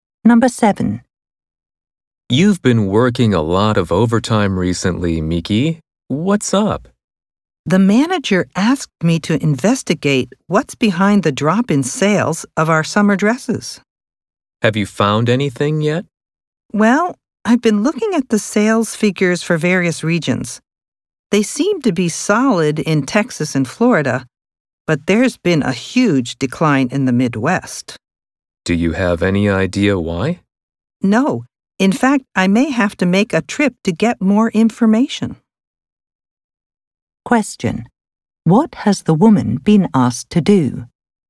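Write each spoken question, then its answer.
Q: What has the woman been asked to do?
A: Investigate why sales of their summer dresses have dropped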